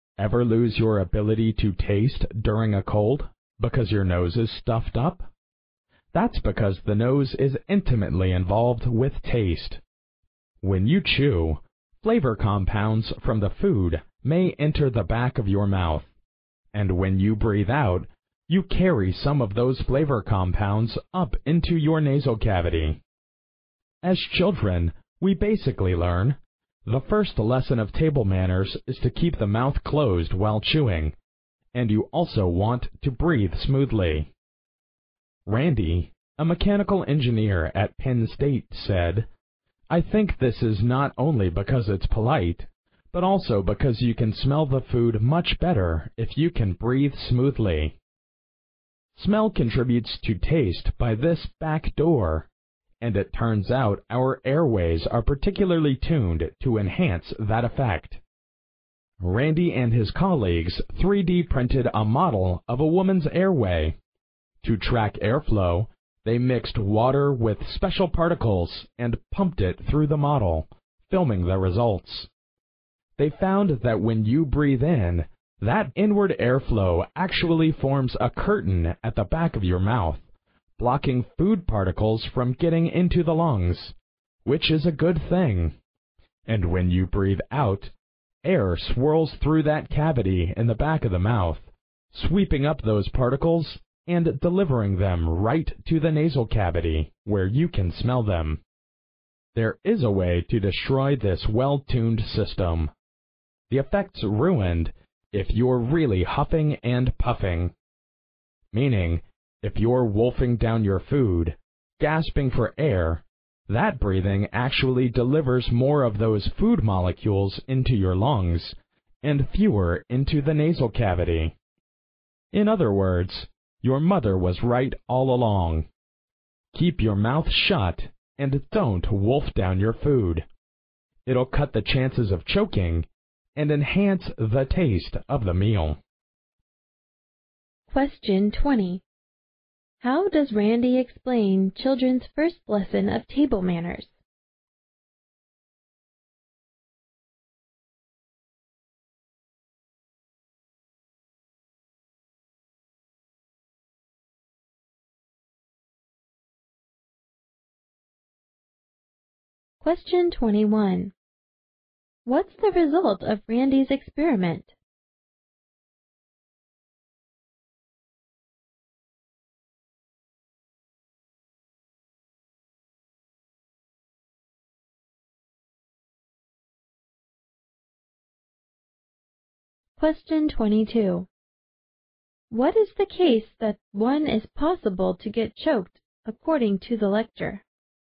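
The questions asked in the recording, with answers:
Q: How does Randy explain children's first lesson of table manners?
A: It's polite and lets you smell the food better by breathing smoothly

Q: What's the result of Randy's experiment?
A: Exhaled air sweeps food particles to the nasal cavity; inhaled air blocks them from the lungs

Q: What is the case that one is possible to get choked according to the lecture?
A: Wolfing down food while gasping for air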